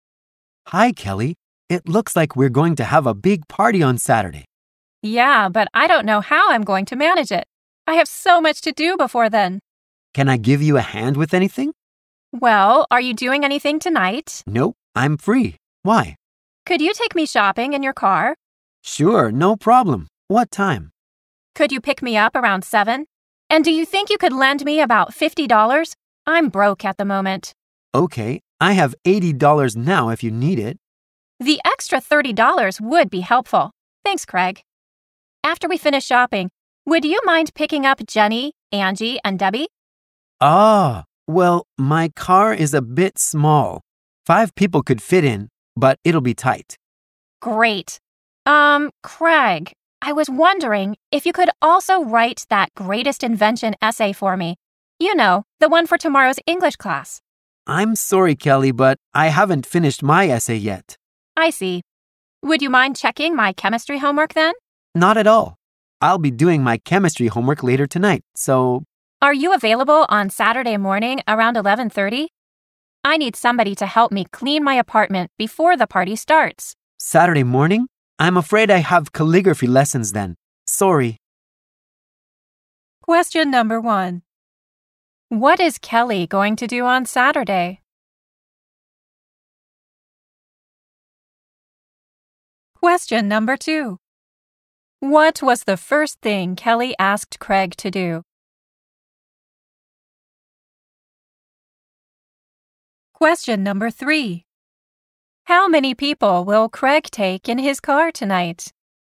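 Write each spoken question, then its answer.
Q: What is Kelly going to do on Saturday?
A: Have a big party.

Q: What was the first thing Kelly asked Craig to do?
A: To take her shopping in his car.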